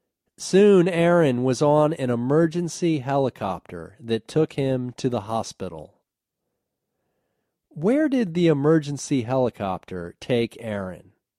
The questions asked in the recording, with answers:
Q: Where did the emergency helicopter take Aaron?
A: The emergency helicopter took Aaron to the hospital.